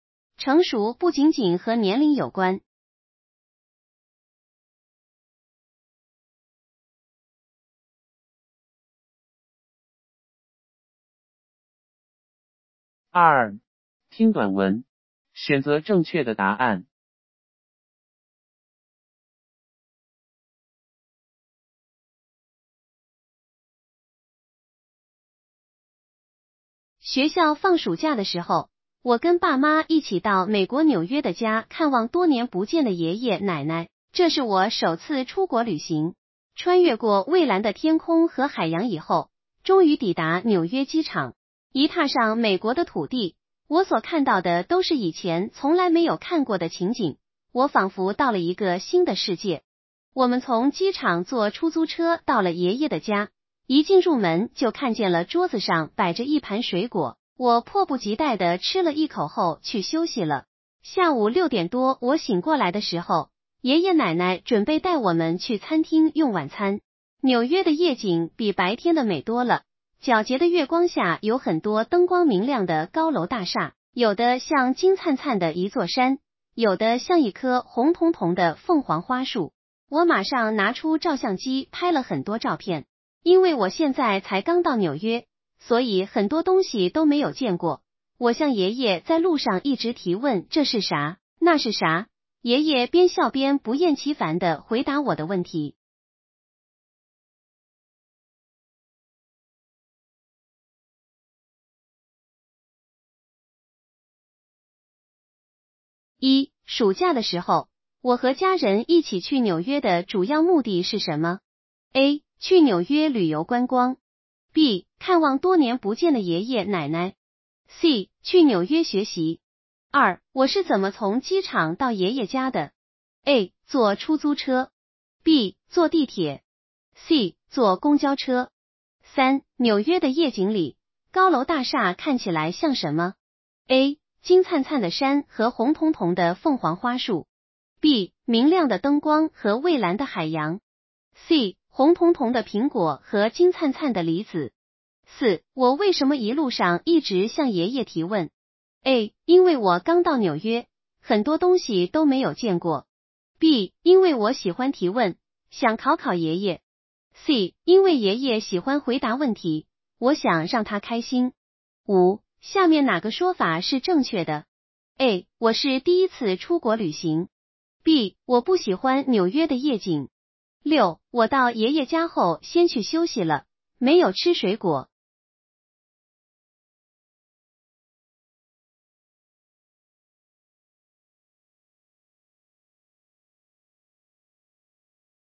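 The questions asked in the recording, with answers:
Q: 暑假的时候,我和家人一起去纽约的主要目的是什么?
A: B: 看望多年不见的爷爷奶奶。

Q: 我是怎么从机场到爷爷家的?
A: A: 坐出租车。

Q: 纽约的夜景里,高楼大厦看起来像什么?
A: A: 金灿灿的山和红彤彤的凤凰花树。

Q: 我为什么一路上一直向爷爷提问?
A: A: 因为我刚到纽约,很多东西都没有见过。

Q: 下面哪个说法是正确的?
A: A: 我是第一次出国旅行。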